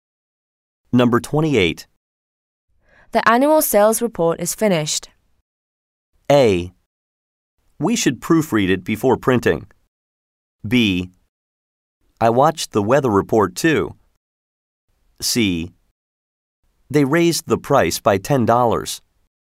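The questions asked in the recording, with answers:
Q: The annual sales report is finished.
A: A: We should proofread it before printing.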